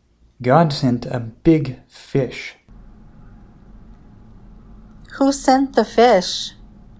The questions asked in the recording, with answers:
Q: Who sent the fish?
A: God sent the fish.